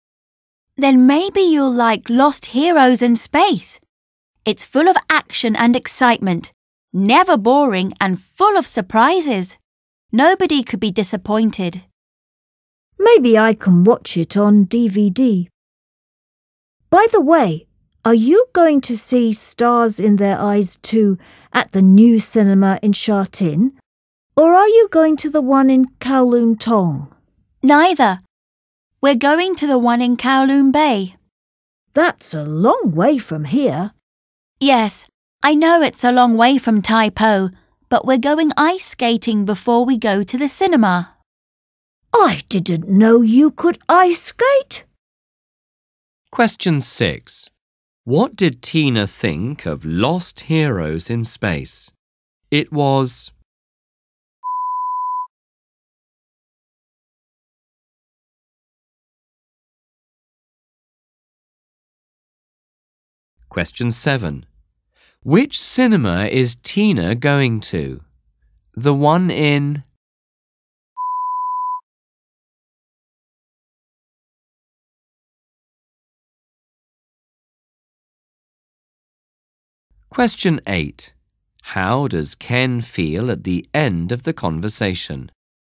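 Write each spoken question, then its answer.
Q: What did Tina think of Lost Heroes in Space?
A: It was full of action and excitement, never boring and full of surprises.

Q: Which cinema is Tina going to?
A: The one in Kowloon Bay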